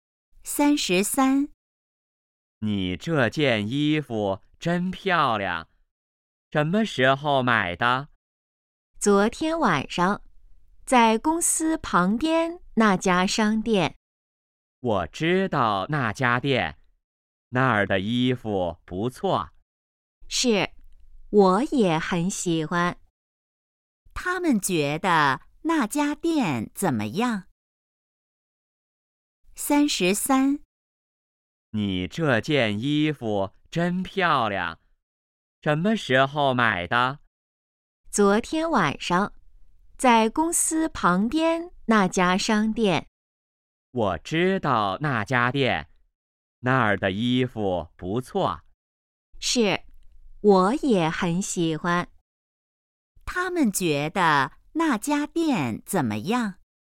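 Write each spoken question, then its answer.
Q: 他们觉得那家店怎么样?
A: 衣服不错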